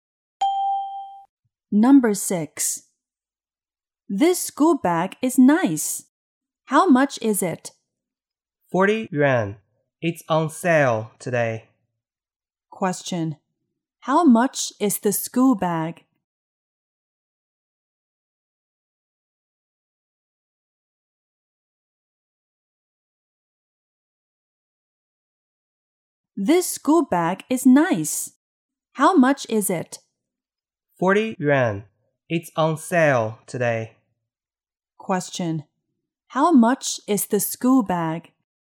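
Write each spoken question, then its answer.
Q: How much is the school bag?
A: 40 yuan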